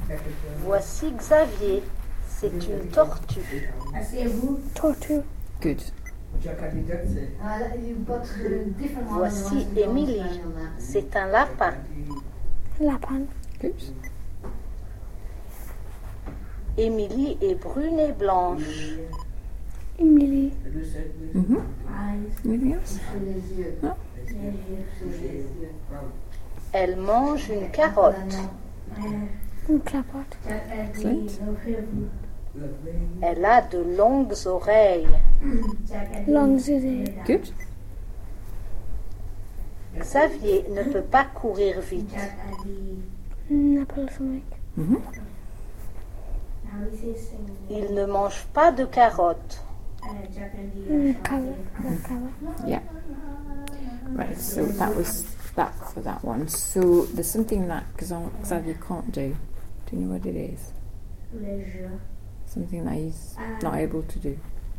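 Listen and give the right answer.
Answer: Run fast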